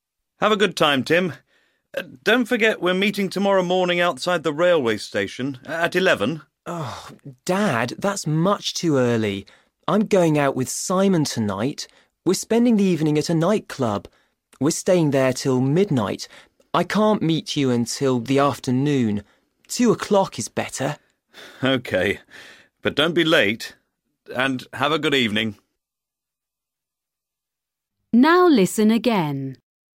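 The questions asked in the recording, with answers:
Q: When is Tim meeting his father?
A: At 2 o'clock tomorrow afternoon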